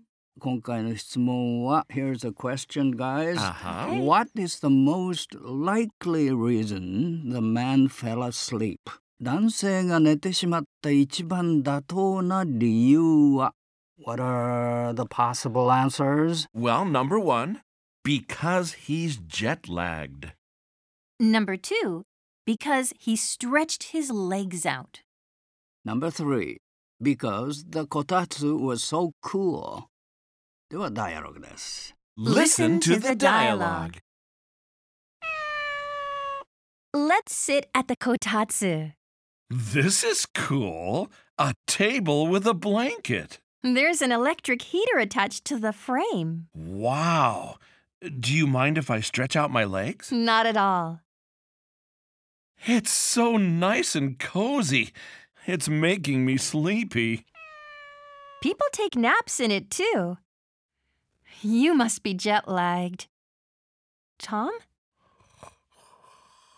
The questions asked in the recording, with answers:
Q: What is the most likely reason the man fell asleep?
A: number one, because he's jet lagged.